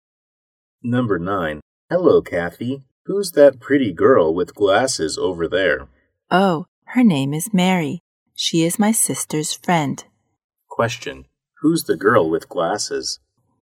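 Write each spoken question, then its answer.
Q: Who's the girl with glasses?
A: Mary, Kathy's sister's friend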